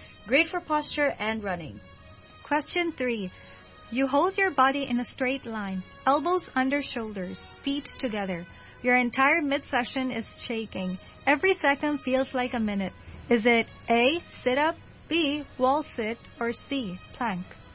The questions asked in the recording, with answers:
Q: You hold your body in a straight line, elbows under shoulders, feet together. Your entire midsection is shaking. Every second feels like a minute. Is it A, sit up, B, wall sit, or C, plank?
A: Plank.